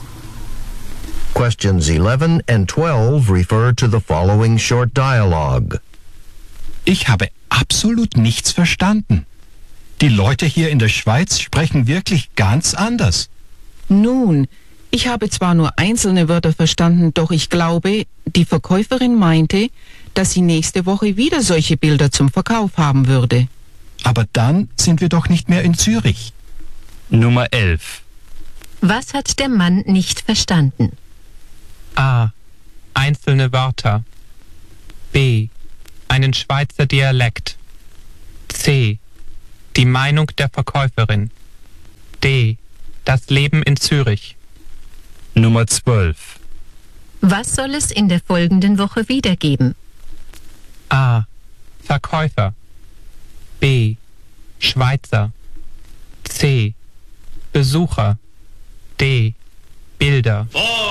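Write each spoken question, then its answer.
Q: Was hat der Mann nicht verstanden?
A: B: Einen Schweizer Dialekt.

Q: Was soll es in der folgenden Woche wiedergeben?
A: D: Bilder.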